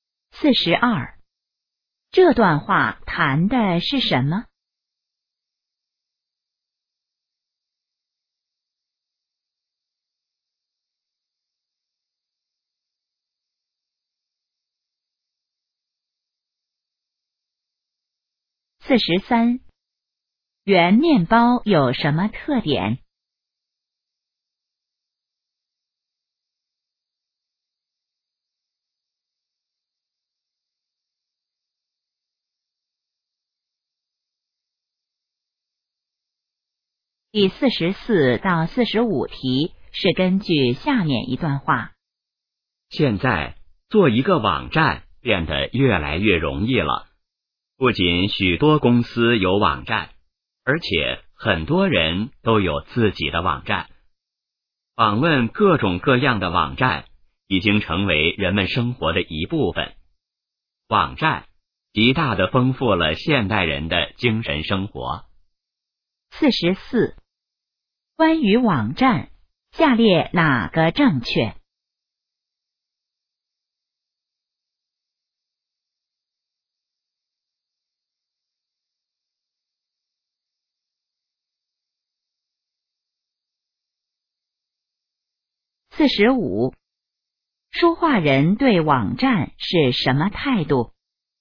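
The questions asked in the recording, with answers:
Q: 关于网站,下列哪个正确?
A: 做网站越来越容易了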